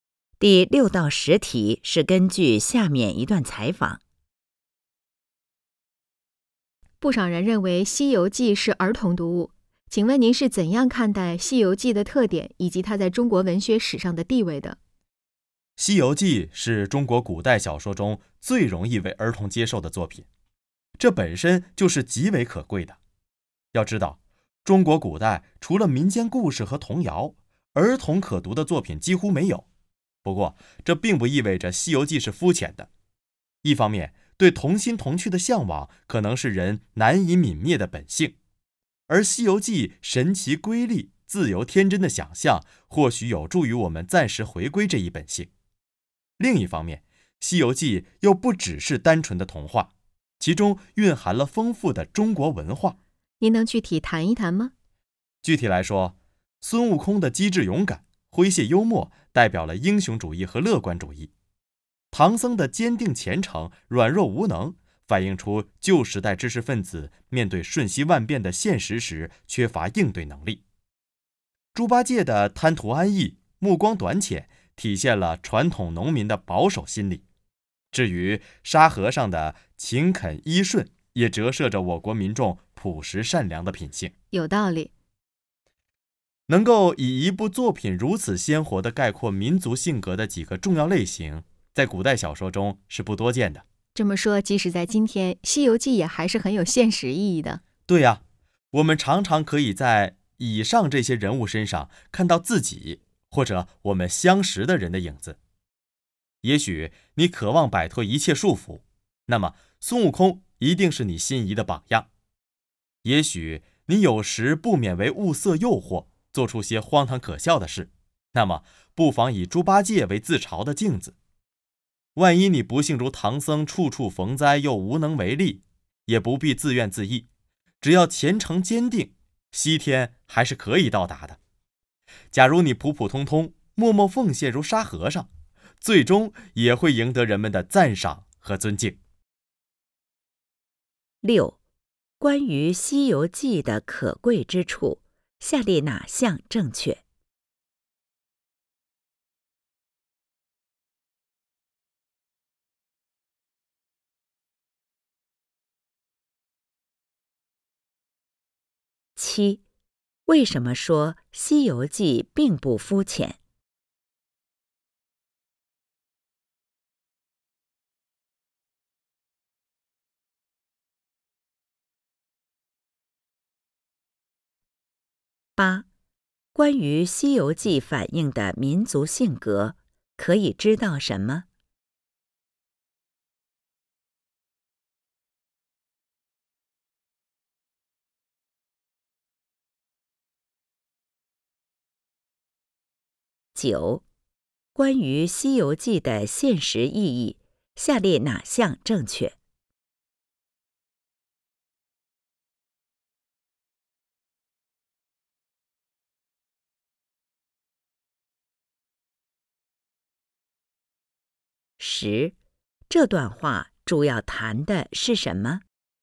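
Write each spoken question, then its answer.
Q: 关于《西游记》的可贵之处,下列哪项正确?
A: 它是中国古代小说中最容易为儿童接受的作品

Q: 为什么说《西游记》并不肤浅?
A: 它不只是单纯的童话,蕴含了丰富的中国文化

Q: 关于《西游记》的现实意义,下列哪项正确?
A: 人们常能在书中人物身上看到自己或熟人的影子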